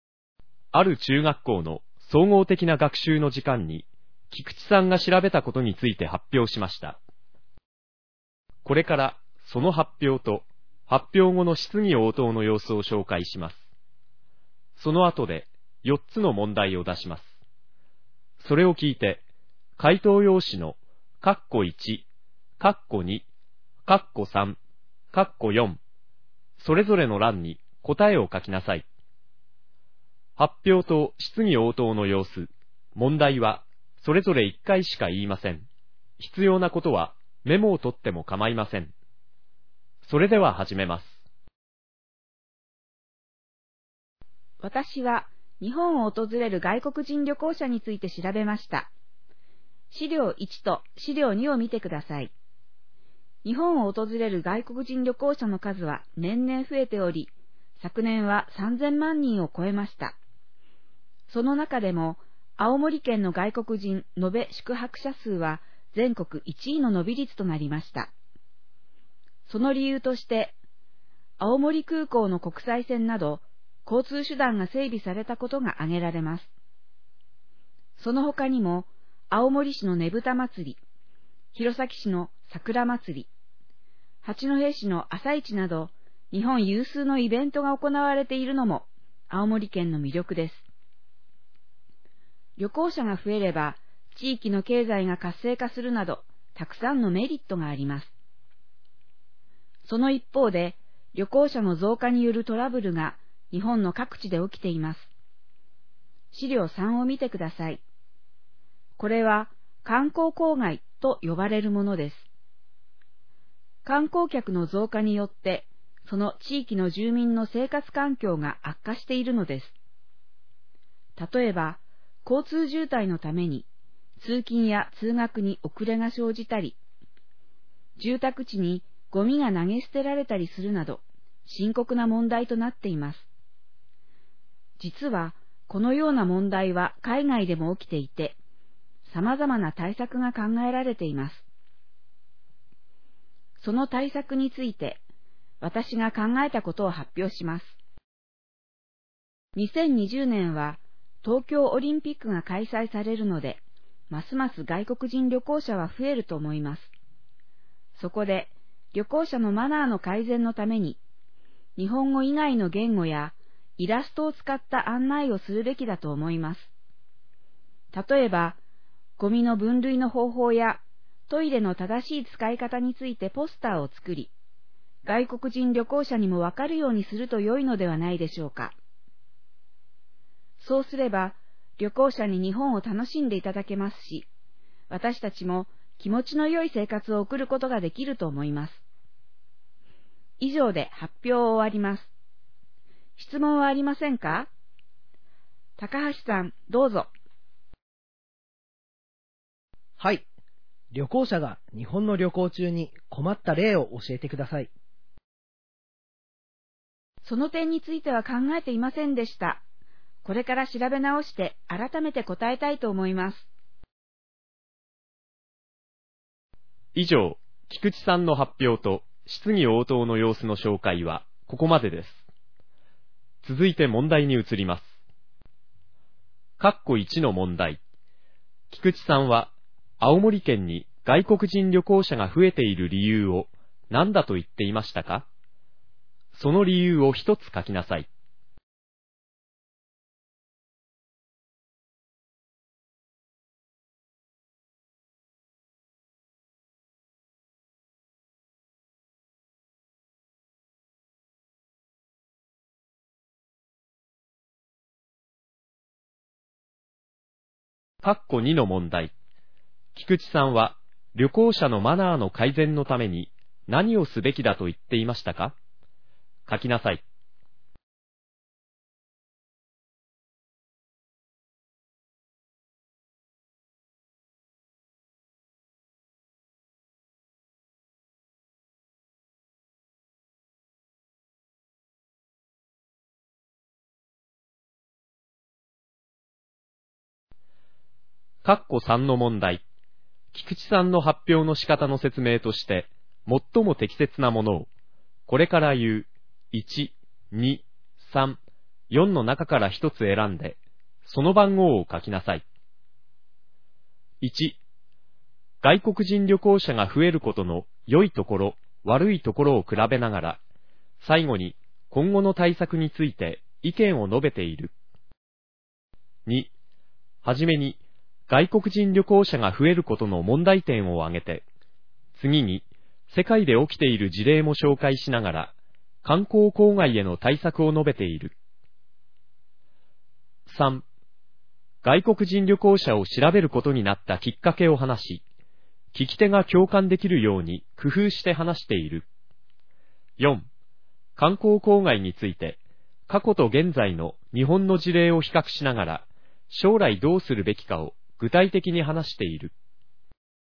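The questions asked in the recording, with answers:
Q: 菊池さんは、青森県に外国人旅行者が増えている理由を何だと言っていましたか?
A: 青森空港の国際線など、交通手段が整備されたこと

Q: 菊池さんは旅行者のマナーの改善のために何をすべきだと言っていましたか?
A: 日本語以外の言語やイラストを使った案内をするべき

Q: 菊池さんの発表の仕方の説明として、最も適切なものを、これから言う、1、2、3、4の中から1つ選んで、その番号を書きなさい。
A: 1: 外国人旅行者が増えることの良いところ、悪いところを比べながら、最後に今後の対策について意見を述べている。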